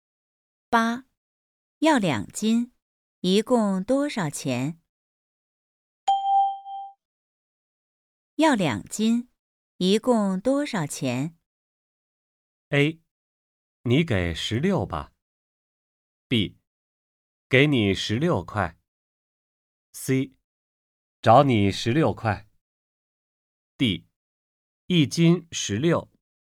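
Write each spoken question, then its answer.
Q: 要两斤,一共多少钱?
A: A: 你给十六吧。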